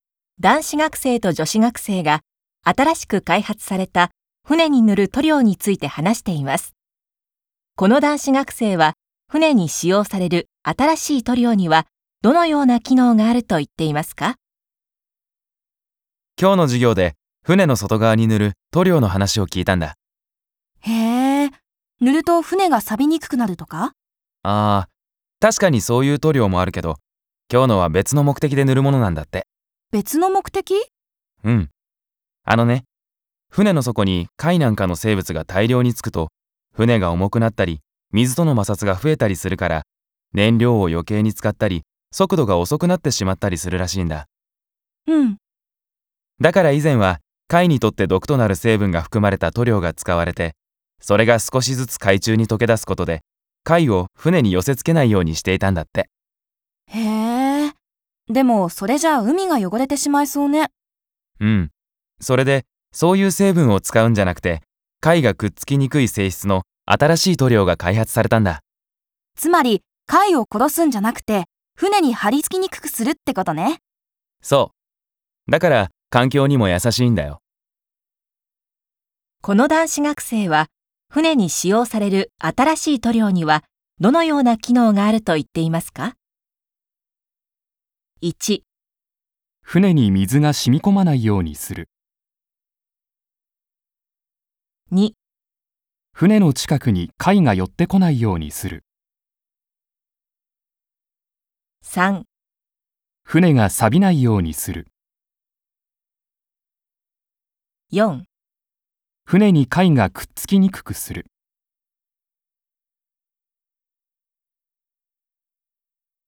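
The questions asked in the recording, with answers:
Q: この男子学生は、船に使用される新しい塗料にはどのような機能があると言っていますか?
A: 4: 船に貝がくっつきにくくする。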